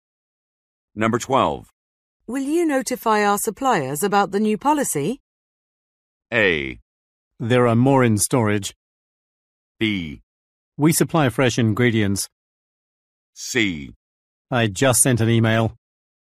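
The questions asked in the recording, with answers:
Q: Will you notify our suppliers about the new policy?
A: C: I just sent an email.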